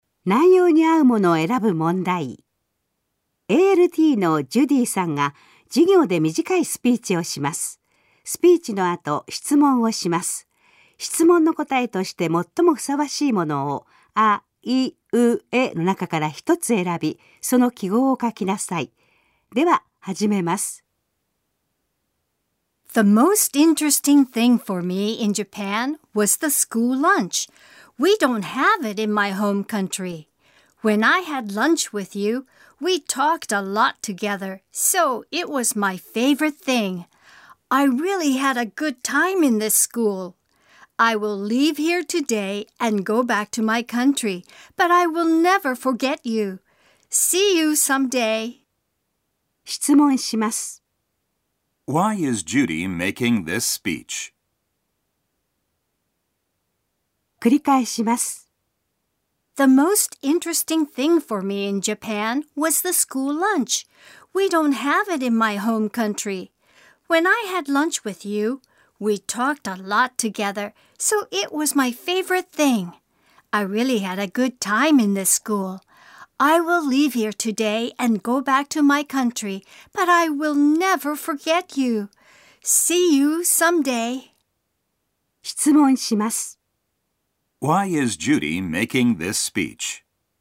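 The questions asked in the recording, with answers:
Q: Why is Judy making this speech?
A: Because she is leaving the school today and going back to her country.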